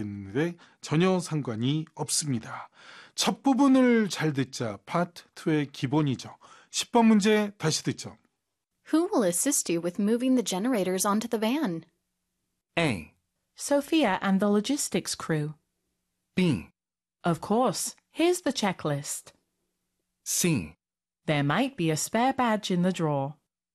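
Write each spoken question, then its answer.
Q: Who will assist you with moving the generators onto the van?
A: A: Sophia and the logistics crew.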